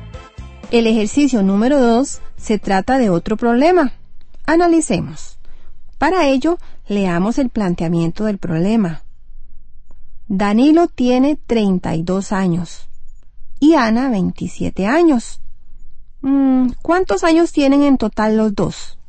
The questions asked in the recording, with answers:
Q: ¿Cuántos años tienen en total los dos?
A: Los dos tienen en total 59 años.